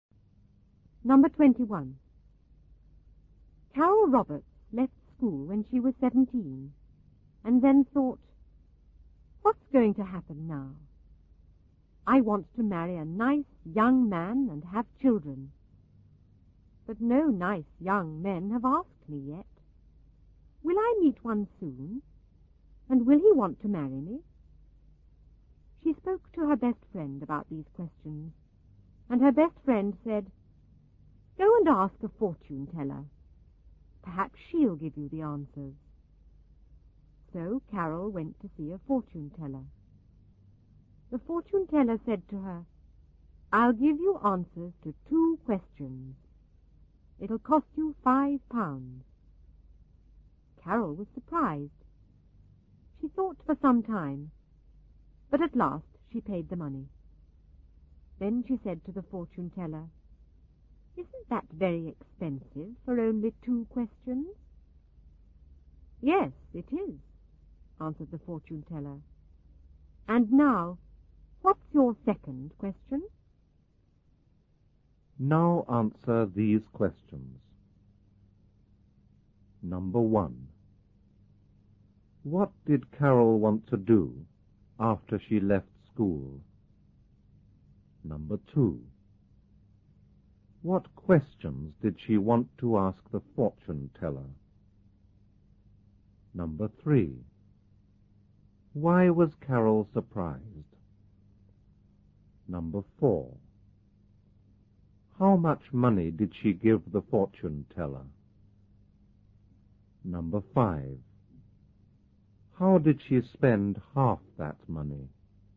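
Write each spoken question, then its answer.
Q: What did Carol want to do after she left school?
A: Marry a nice young man and have children

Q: What questions did she want to ask the fortune teller?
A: Will I meet a nice young man soon? And will he want to marry me?

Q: Why was Carol surprised?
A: Because it cost £5 for only two questions

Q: How did she spend half that money?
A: By asking whether it wasn't very expensive for only two questions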